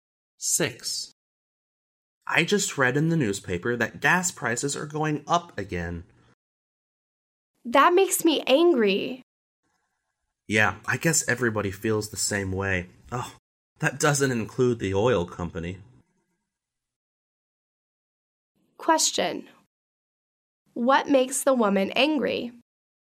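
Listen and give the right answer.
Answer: Gas prices are going up again.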